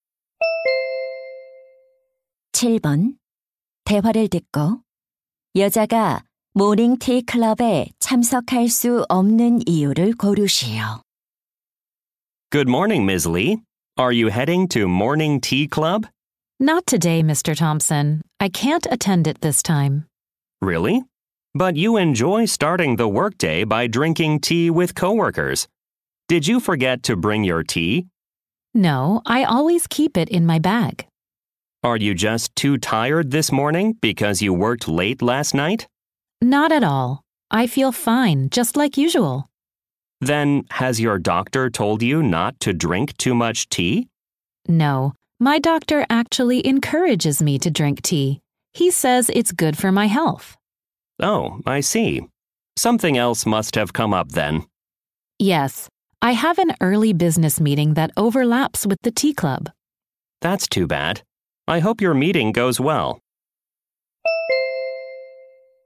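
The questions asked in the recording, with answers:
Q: 대화를 듣고 여자가 모닝티 클럽에 참석할 수 없는 이유를 고르시오.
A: 이른 업무 회의가 있어서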